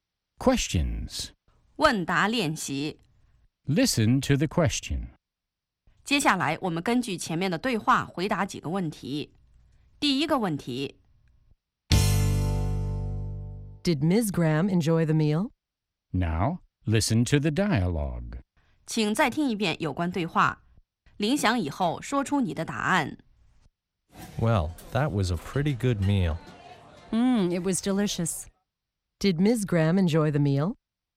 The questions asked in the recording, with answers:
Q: Did Ms. Graham enjoy the meal?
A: Yes, she did. She thought it was delicious.